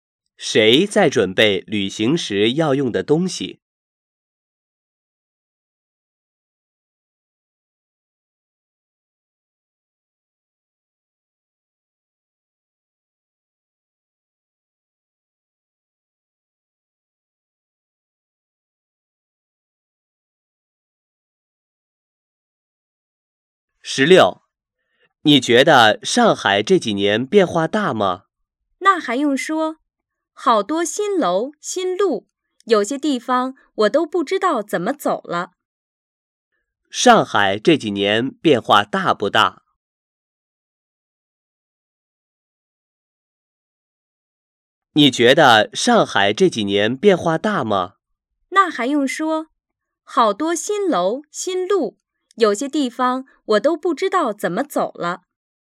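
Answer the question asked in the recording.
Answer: 很大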